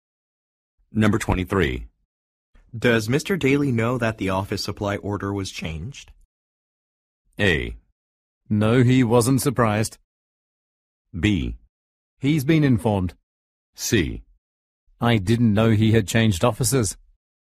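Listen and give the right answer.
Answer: B: He's been informed.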